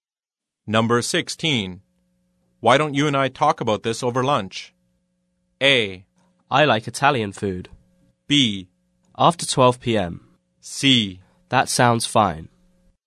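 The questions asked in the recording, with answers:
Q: Why don't you and I talk about this over lunch?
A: C: That sounds fine.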